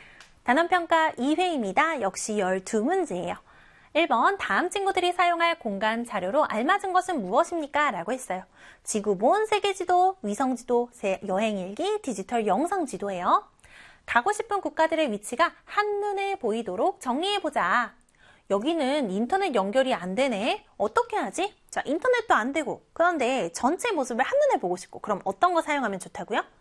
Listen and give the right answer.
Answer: 그렇죠. 바로 세계 지도 사용하면 좋다라고 했습니다.